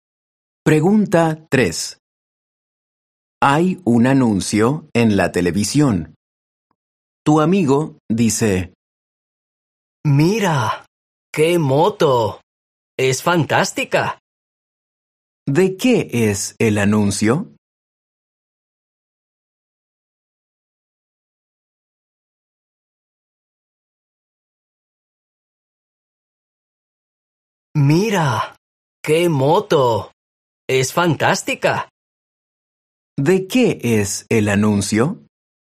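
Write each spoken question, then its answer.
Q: ¿De qué es el anuncio?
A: De una moto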